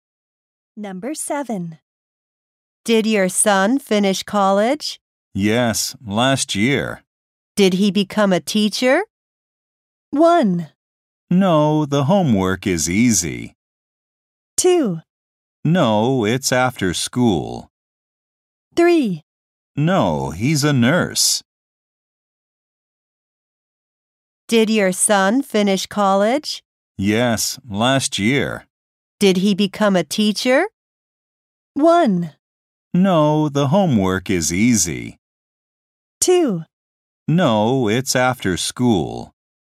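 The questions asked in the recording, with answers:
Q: Did he become a teacher?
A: 3: No, he's a nurse.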